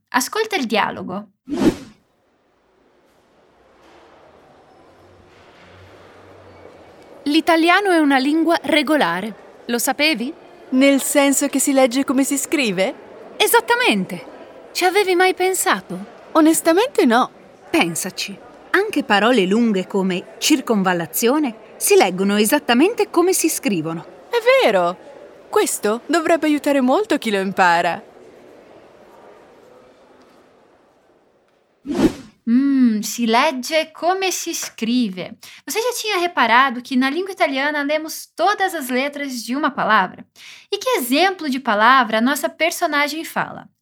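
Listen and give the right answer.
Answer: circonvallazione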